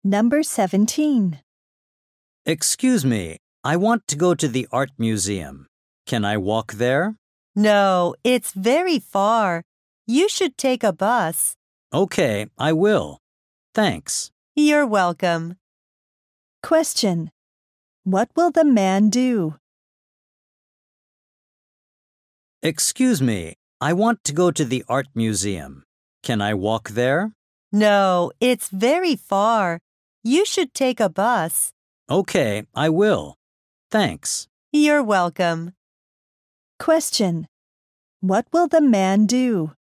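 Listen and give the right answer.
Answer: Take a bus to the art museum.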